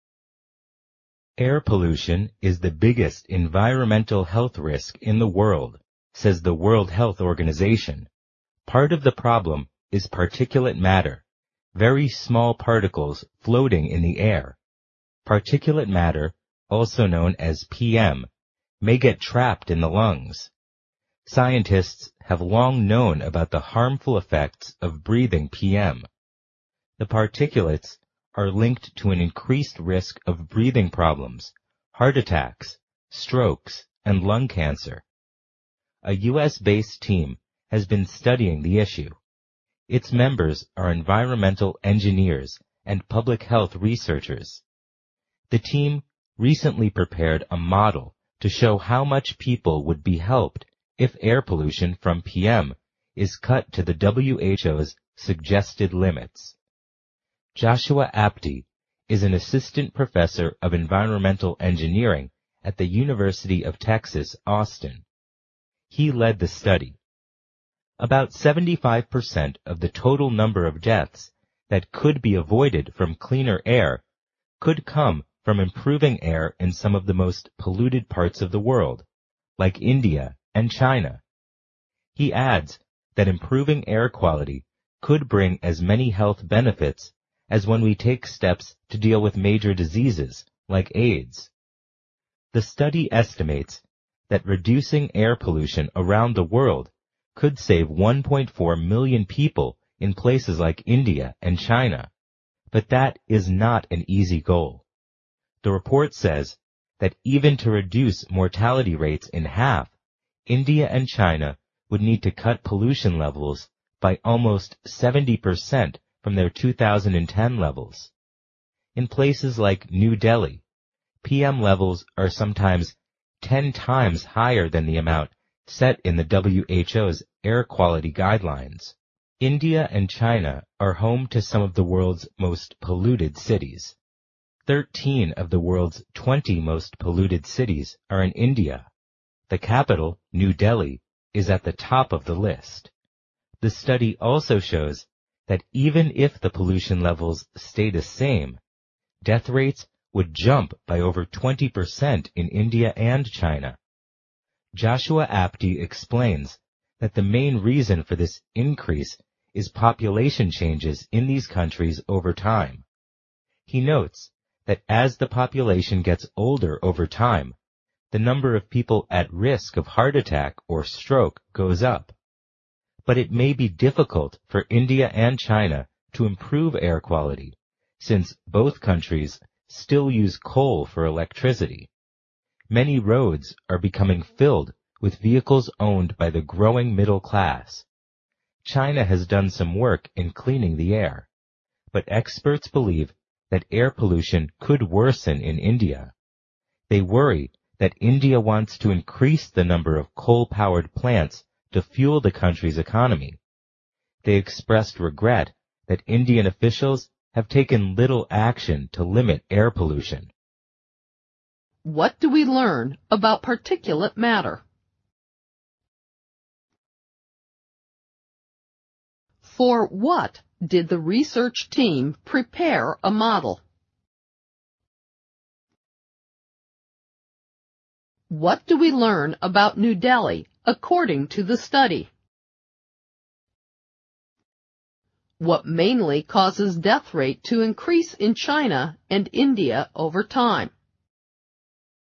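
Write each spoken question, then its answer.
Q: What do we learn about particulate matter?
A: It consists of very small particles in the air that may get trapped in the lungs and is linked to breathing problems, heart attacks, strokes and lung cancer.

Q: What do we learn about New Delhi according to the study?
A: Its PM levels are sometimes 10 times higher than the WHO guideline amount; it tops the list of the most polluted cities.

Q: What mainly causes death rate to increase in China and India over time?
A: Population changes: the population is getting older.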